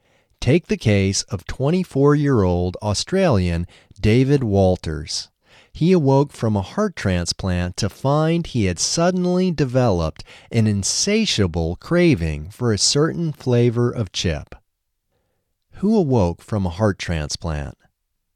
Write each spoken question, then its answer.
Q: Who awoke from a heart transplant?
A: David Walters awoke from a heart transplant.